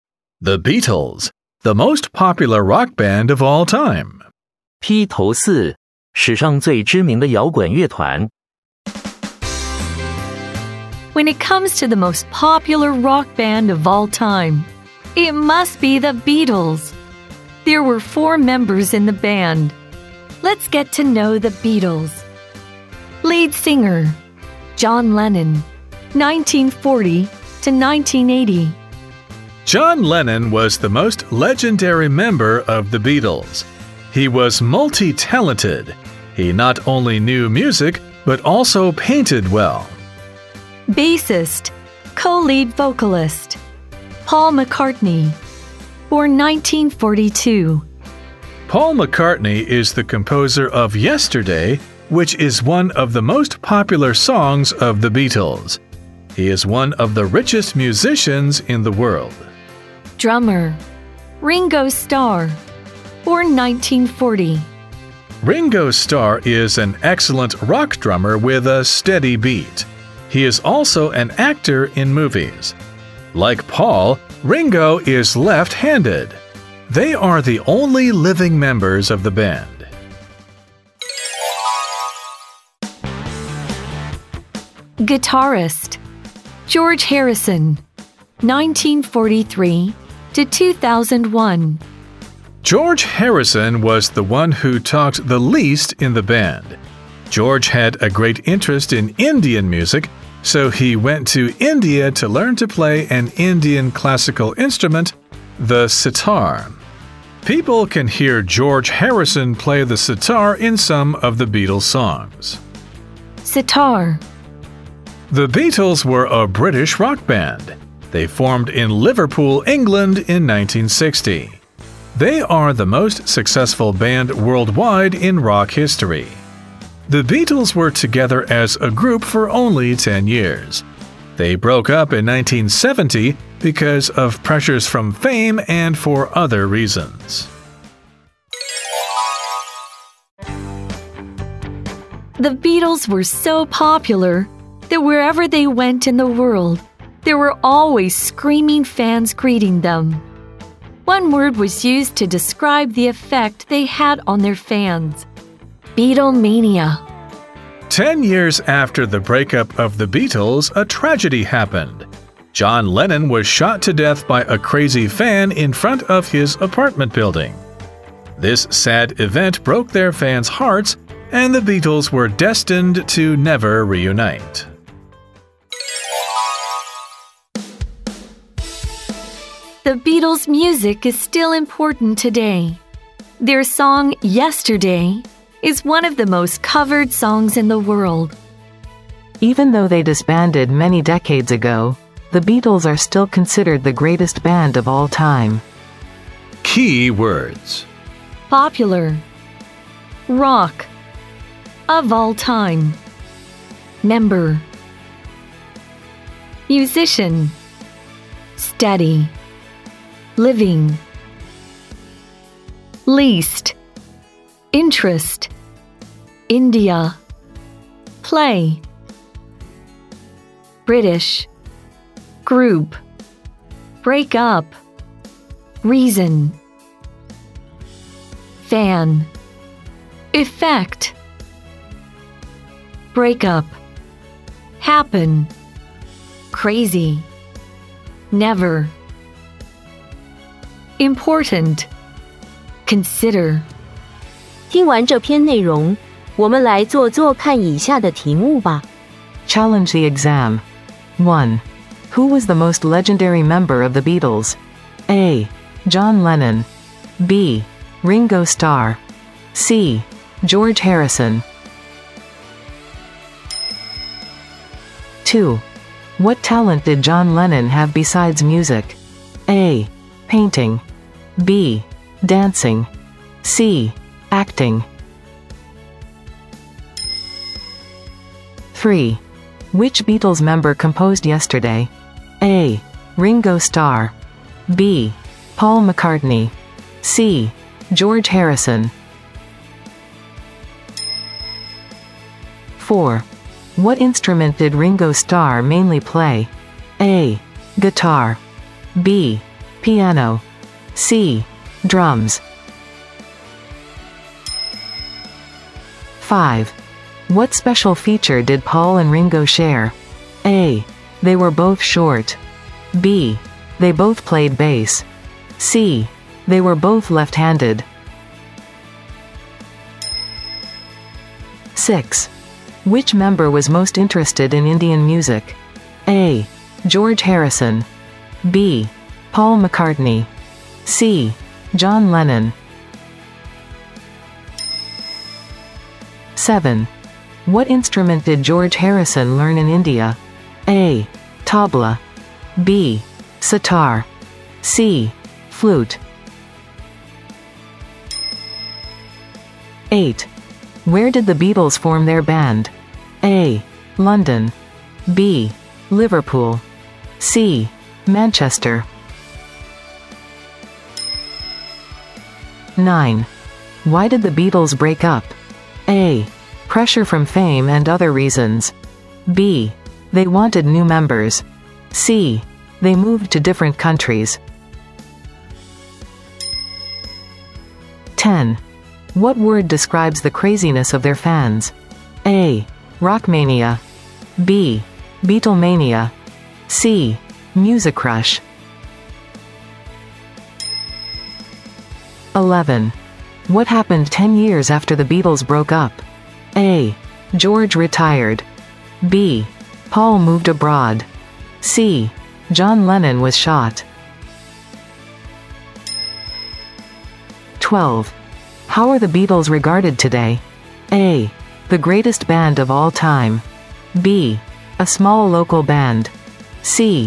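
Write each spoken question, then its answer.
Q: What talent did John Lennon have besides music?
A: A: Painting.

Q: What instrument did Ringo Starr mainly play?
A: C: Drums.

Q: What special feature did Paul and Ringo share?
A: C: They were both left-handed.

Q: Which member was most interested in Indian music?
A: A: George Harrison.

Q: What instrument did George Harrison learn in India?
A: B: Sitar.

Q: What word describes the craziness of their fans?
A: B: Beatlemania.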